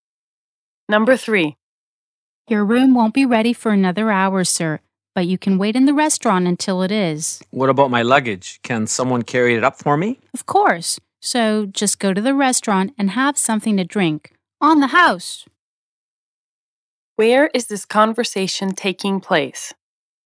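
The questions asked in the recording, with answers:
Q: Where is this conversation taking place?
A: At a hotel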